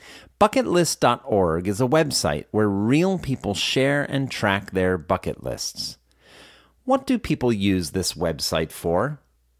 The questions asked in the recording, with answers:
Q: What do people use this website for?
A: People use this website to share and track their bucket lists.